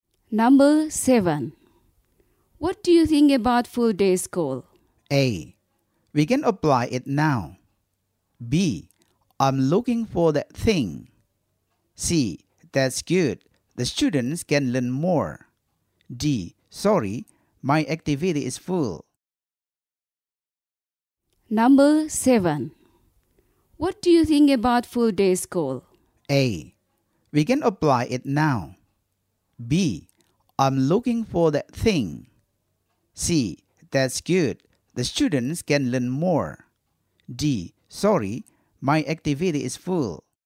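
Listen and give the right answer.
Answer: C: That's good. The students can learn more.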